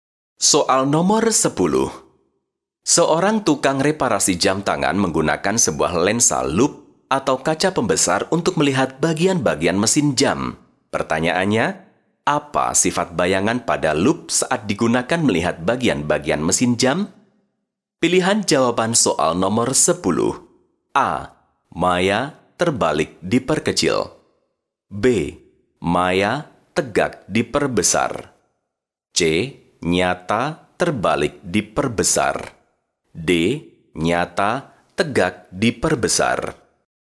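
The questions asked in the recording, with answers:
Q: Pertanyaannya, apa sifat bayangan pada lup saat digunakan melihat bagian-bagian mesin jam?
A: B: Maya tegak diperbesar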